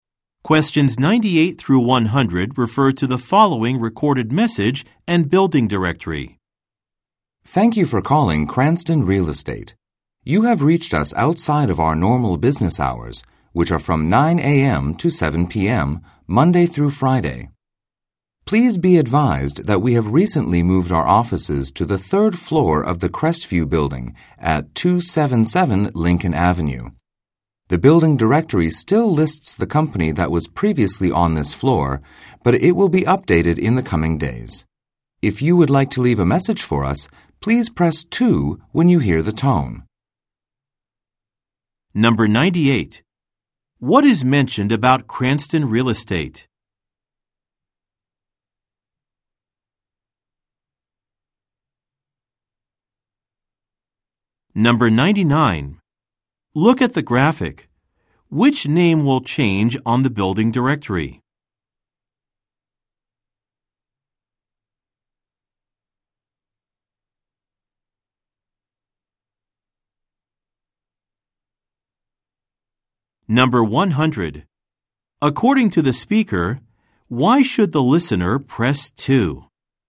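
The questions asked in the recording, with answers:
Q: What is mentioned about Cranston Real Estate?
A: It recently moved its offices (to the third floor of the Crestview building)

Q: According to the speaker, why should the listener press 2?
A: To leave a message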